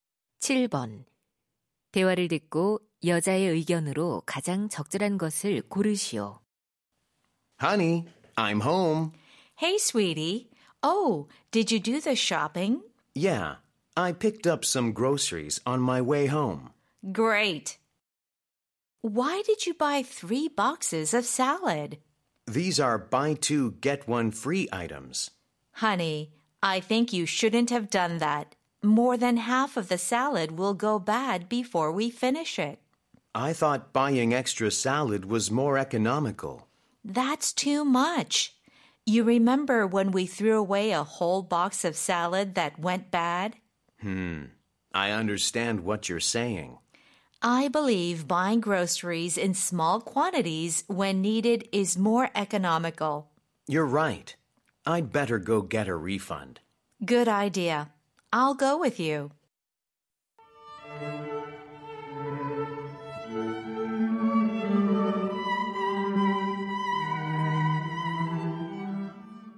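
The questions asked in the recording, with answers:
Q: 대화를 듣고 여자의 의견으로 가장 적절한 것을 고르시오.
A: 식료품은 필요할 때 소량으로 사는 것이 더 경제적이다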